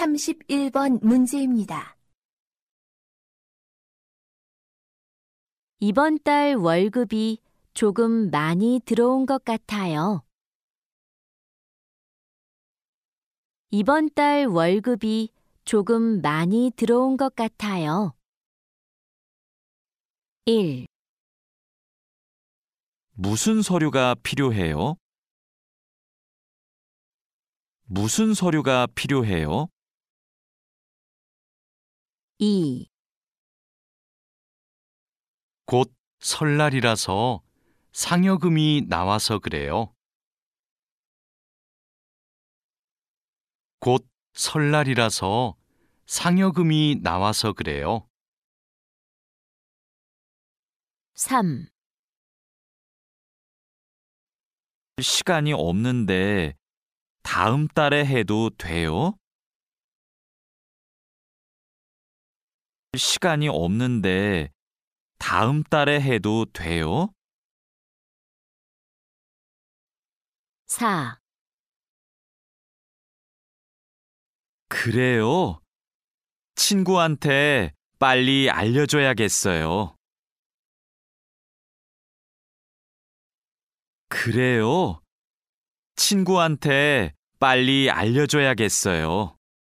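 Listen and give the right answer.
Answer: 2: 곧 설날이라서 상여금이 나와서 그래요.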